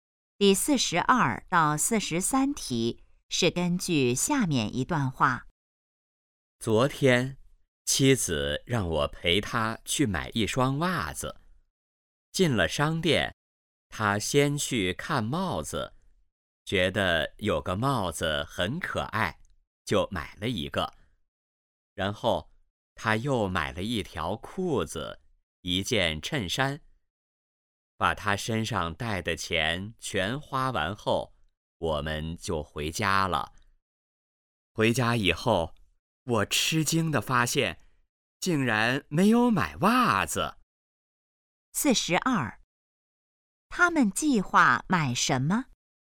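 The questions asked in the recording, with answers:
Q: 他们计划买什么?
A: 袜子

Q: 说话人是谁?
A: 丈夫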